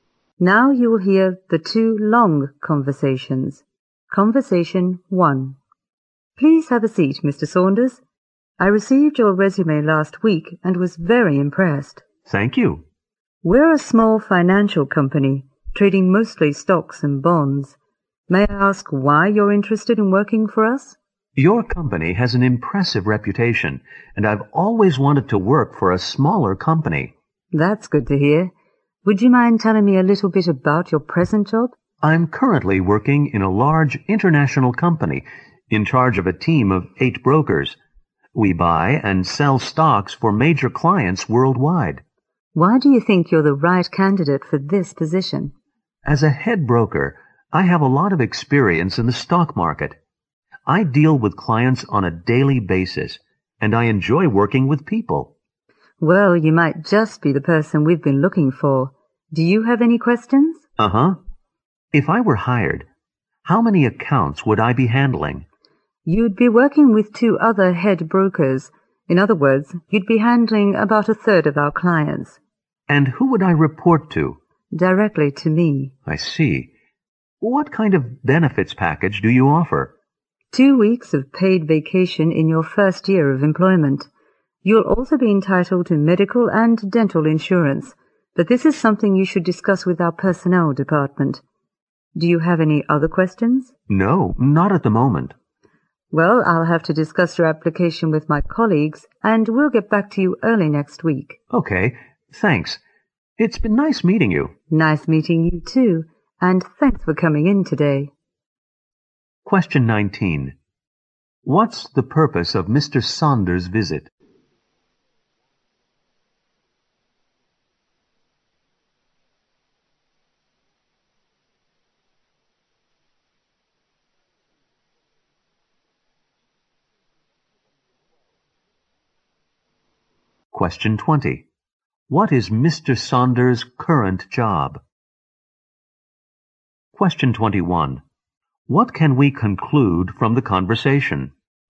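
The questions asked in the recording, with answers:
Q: What's the purpose of Mr. Saunders' visit?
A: To have a job interview

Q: What is Mr. Saunders' current job?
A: A head broker in a large international company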